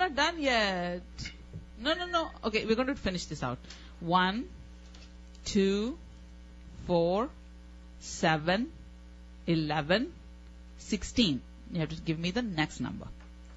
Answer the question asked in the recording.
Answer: 22.